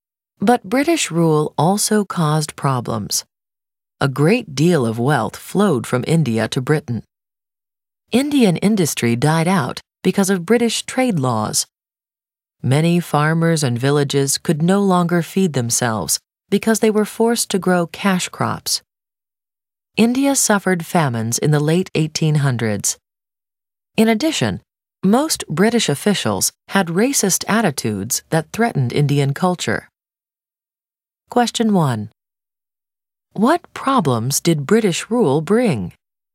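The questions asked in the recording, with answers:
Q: What problems did British rule bring?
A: Wealth flowed to Britain, Indian industry died out, farmers forced to grow cash crops led to famines, and racist attitudes threatened Indian culture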